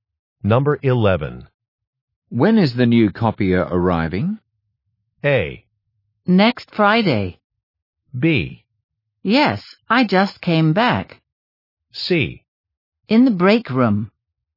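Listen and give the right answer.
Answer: A: Next Friday.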